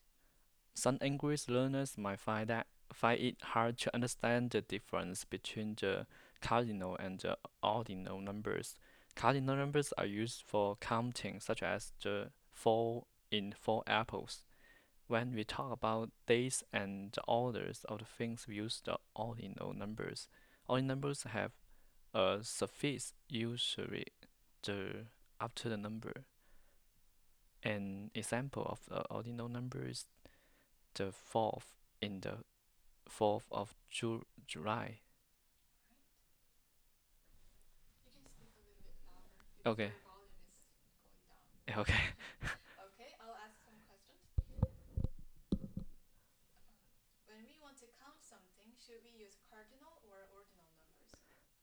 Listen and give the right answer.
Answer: We should use the cardinal numbers.